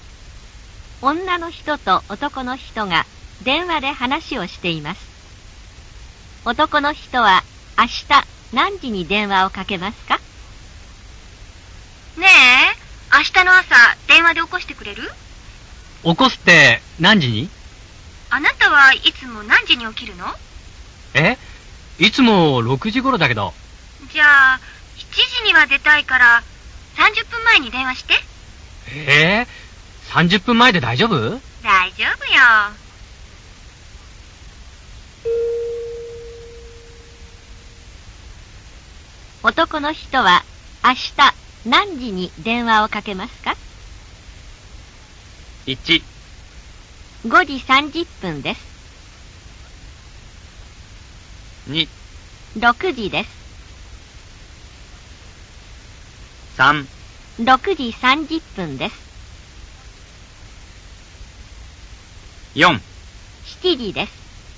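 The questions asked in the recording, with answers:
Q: 男の人は明日何時に電話をかけますか?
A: 3: 6時30分です。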